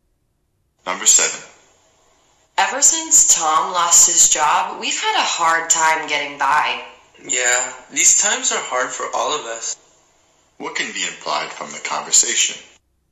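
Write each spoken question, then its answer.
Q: What can be implied from the conversation?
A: They are struggling financially since Tom lost his job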